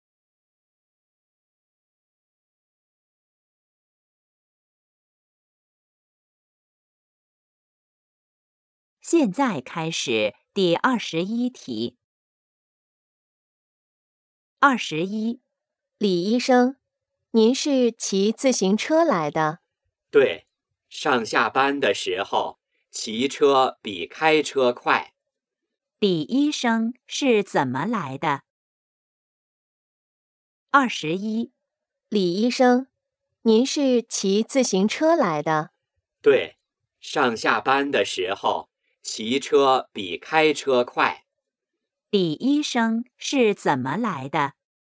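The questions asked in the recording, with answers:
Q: 李医生是怎么来的?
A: 骑自行车来的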